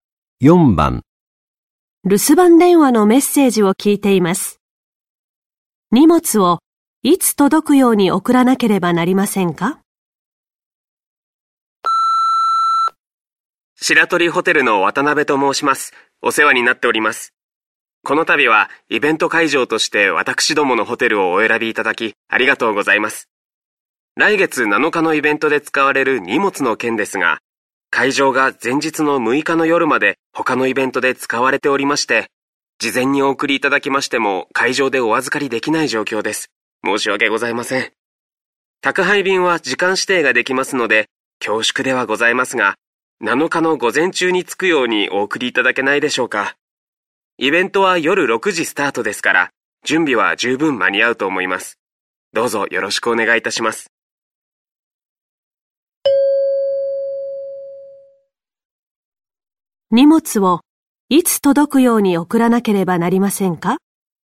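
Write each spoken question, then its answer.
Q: 荷物をいつ届くように送らなければなりませんか?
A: 7日の午前中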